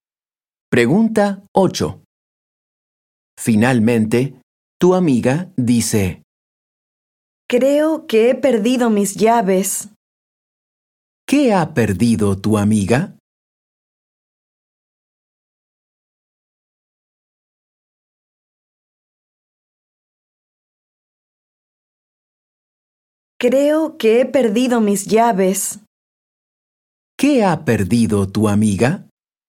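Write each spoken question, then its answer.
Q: ¿Qué ha perdido tu amiga?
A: sus llaves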